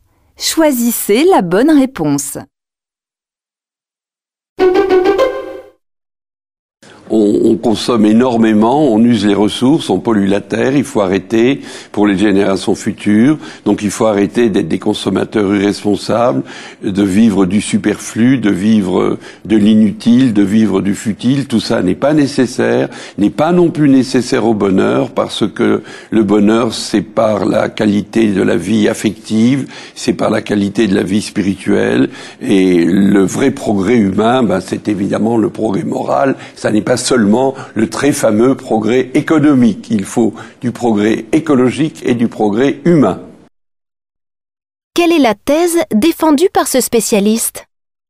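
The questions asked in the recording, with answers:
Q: Quelle est la thèse défendue par ce spécialiste ?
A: Il faut cesser la surconsommation : le bonheur et le vrai progrès sont affectifs, spirituels et moraux, pas économiques.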